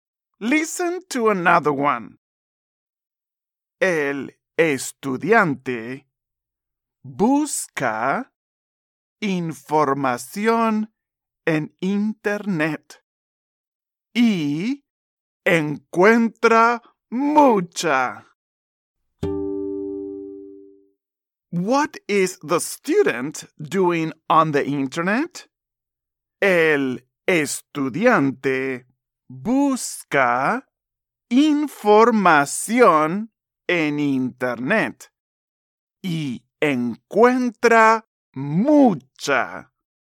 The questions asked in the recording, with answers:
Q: What is the student doing on the internet?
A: Muy bien. He's looking for information.